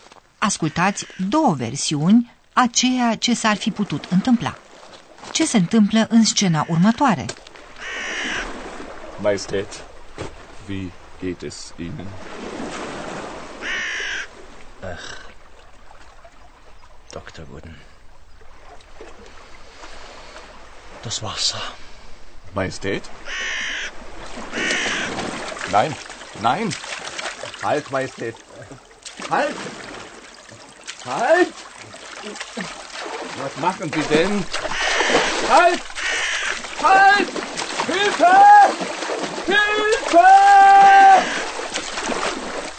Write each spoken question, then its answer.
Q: Ce se întâmplă în scena următoare?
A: Dar melancolicul rege intră în apă, medicul nu-l poate reține și amândoi se neacă în timp ce medicul se lupta cu regele, încercând să-l salveze.